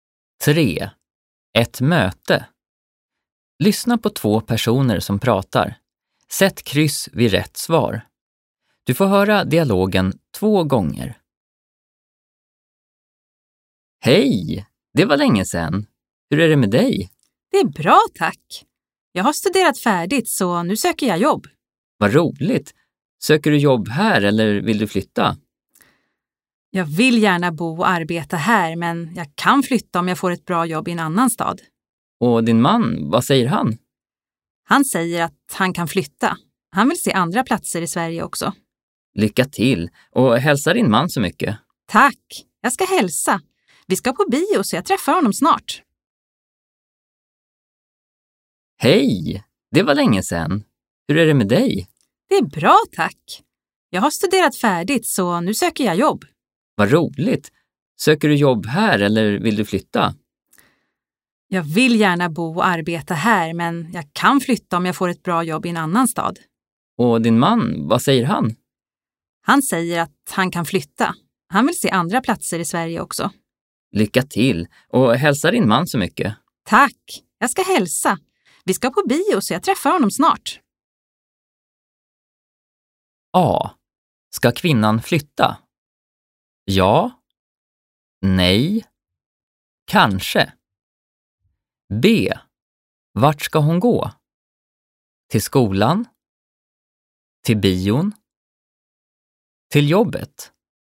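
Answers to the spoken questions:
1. Kanske
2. Till bion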